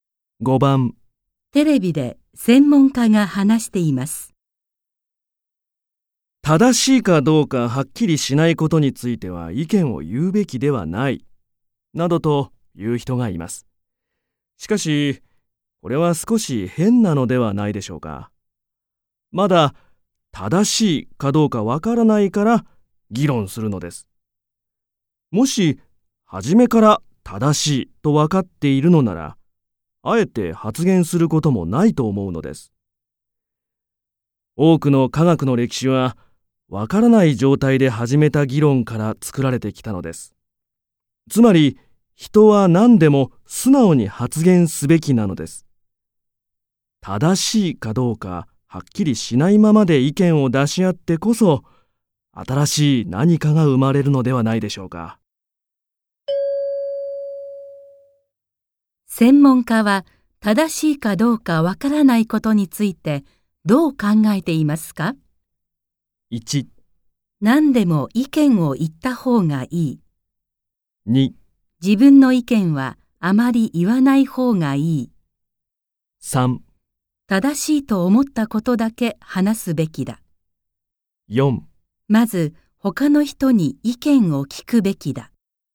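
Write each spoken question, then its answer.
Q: 専門家は正しいかどうかわからないことについてどう考えていますか ?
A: 1: 何でも意見を言った方がいい。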